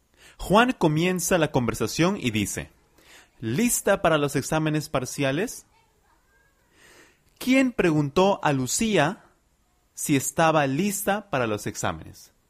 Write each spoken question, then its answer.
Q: ¿Quién preguntó a Lucía si estaba lista para los exámenes.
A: Juan. Juan preguntó a Lucía si estaba preparada para los exámenes parciales.